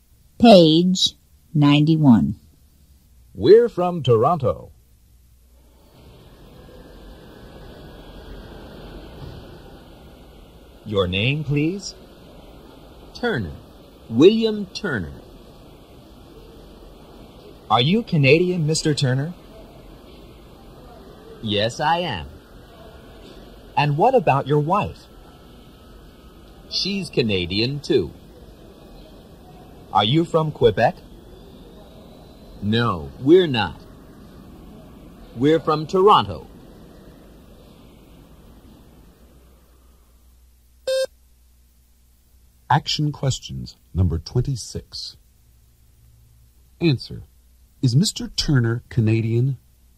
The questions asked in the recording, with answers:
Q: Is Mr. Turner Canadian?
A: Yes, he is.